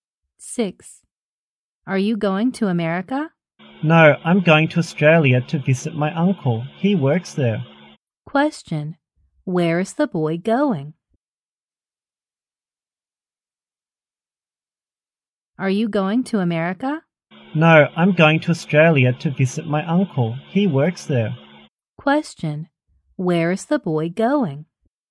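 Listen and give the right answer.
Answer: Australia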